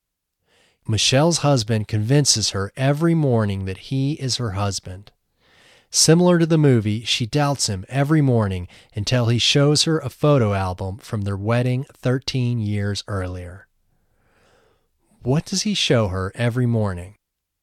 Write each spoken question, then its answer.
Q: What does he show her every morning?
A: Every morning, he shows her a photo album from their wedding 13 years earlier.